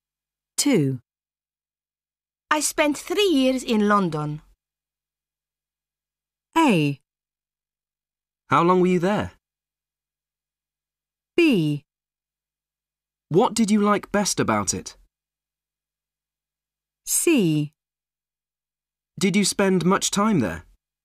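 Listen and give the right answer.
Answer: B: What did you like best about it?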